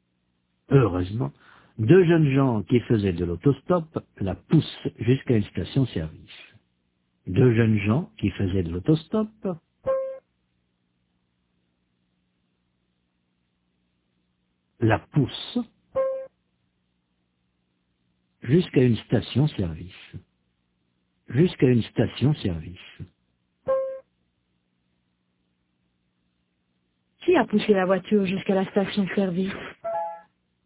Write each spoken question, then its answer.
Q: Qui a poussé la voiture jusqu'à la station-service ?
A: Deux jeunes gens qui faisaient de l'autostop.